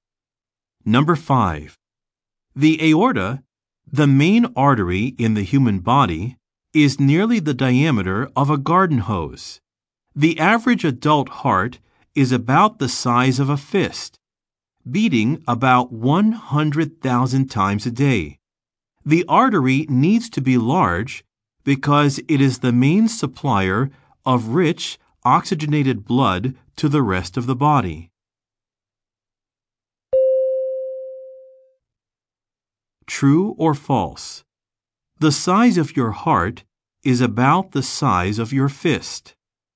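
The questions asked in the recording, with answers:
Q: True or false? The size of your heart is about the size of your fist.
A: True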